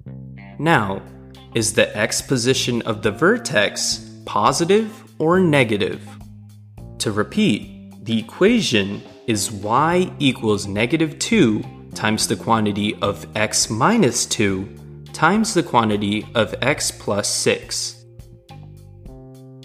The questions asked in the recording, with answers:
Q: Now, is the x position of the vertex positive or negative?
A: The x position of the vertex is negative